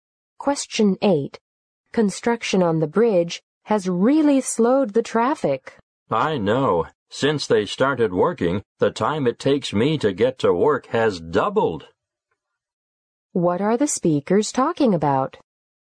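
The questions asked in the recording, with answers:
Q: What are the speakers talking about?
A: Traffic slowed by construction on the bridge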